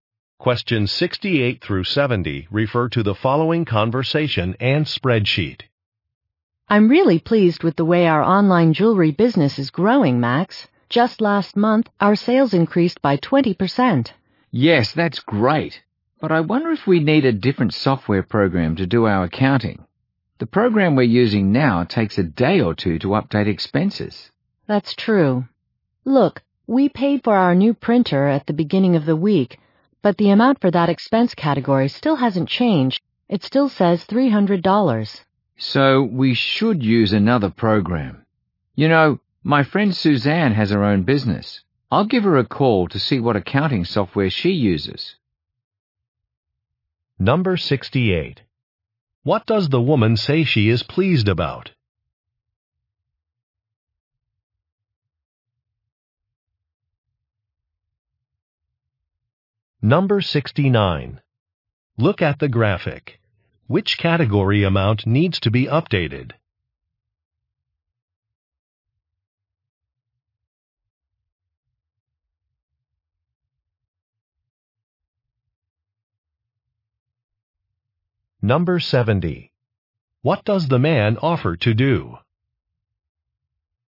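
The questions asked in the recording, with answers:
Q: What does the woman say she is pleased about?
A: The growth of their online business (20% sales increase)

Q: What does the man offer to do?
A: Call a friend to ask what accounting software she uses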